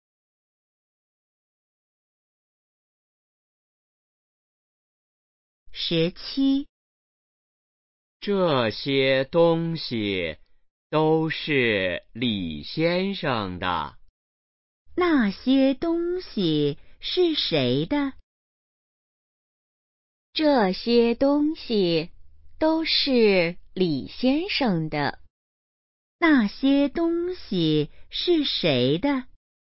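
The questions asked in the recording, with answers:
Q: 那些东西是谁的?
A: 李先生的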